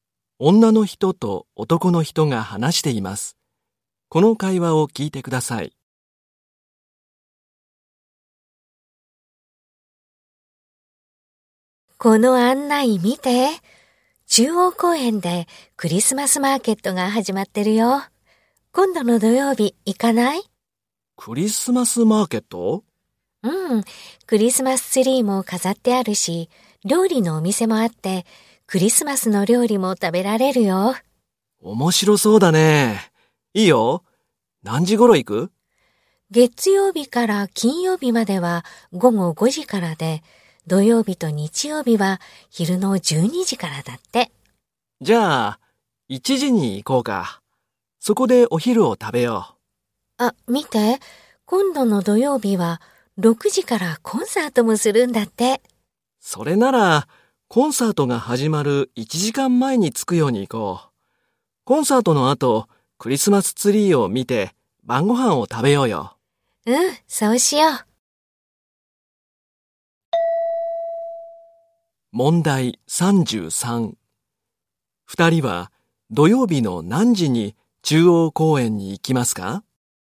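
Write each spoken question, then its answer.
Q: 二人は土曜日の何時に中央公園に行きますか?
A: 5時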